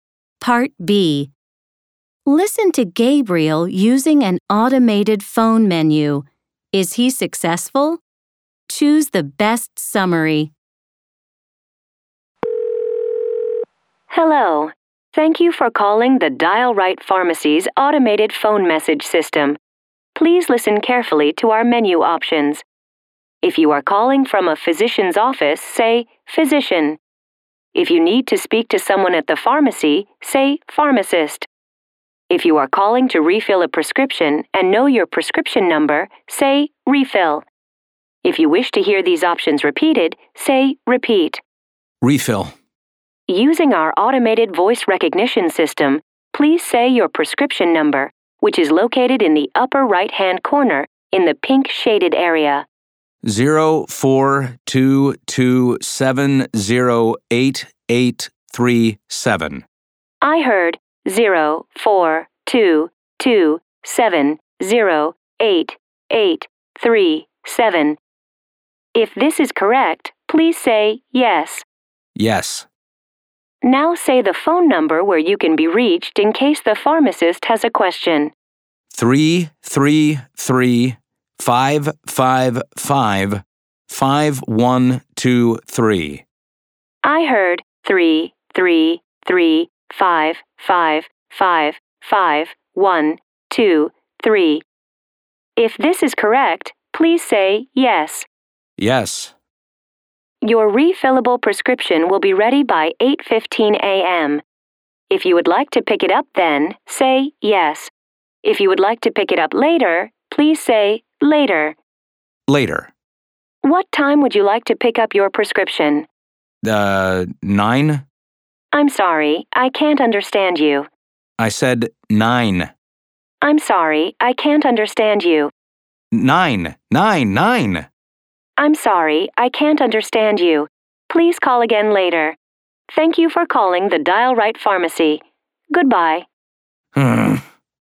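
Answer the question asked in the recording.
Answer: No, only partly: the refill request works, but the system can't understand his pickup time, so he has to call again later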